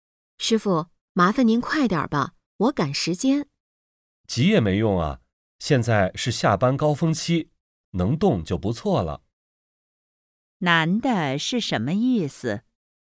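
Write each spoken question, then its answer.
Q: 男的是什么意思?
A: 现在是下班高峰期,堵车,急也没用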